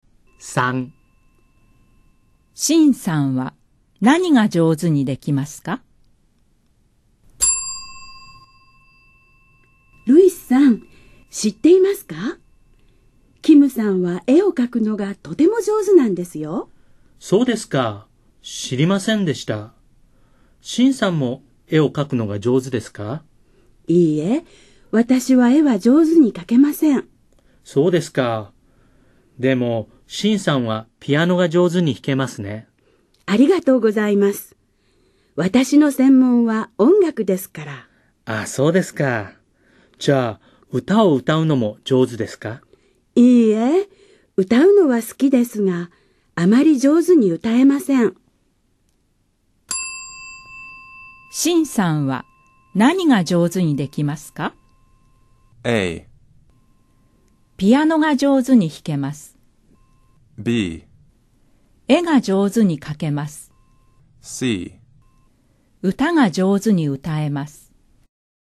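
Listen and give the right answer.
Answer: A: ピアノが上手に弾けます。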